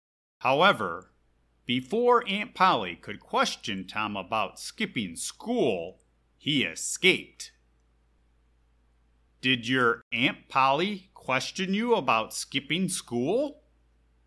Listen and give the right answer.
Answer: No. She tried to question me about skipping school, but I escaped before she had the opportunity.